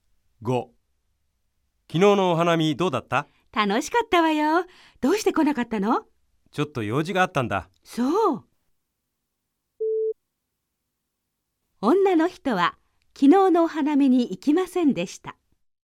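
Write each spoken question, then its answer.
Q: 女の人は昨日のお花見に行きませんでした。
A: ×(正しくない)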